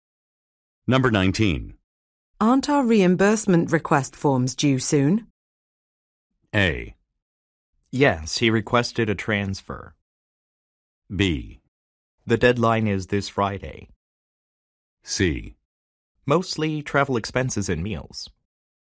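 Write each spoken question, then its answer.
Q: Aren't our reimbursement request forms due soon?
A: B: The deadline is this Friday.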